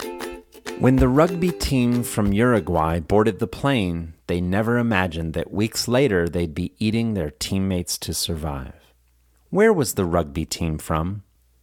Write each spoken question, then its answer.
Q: Where was the rugby team from?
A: The rugby team was from Uruguay.